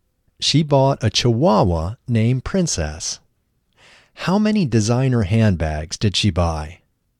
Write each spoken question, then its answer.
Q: How many designer handbags did she buy?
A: She bought 50 designer handbags.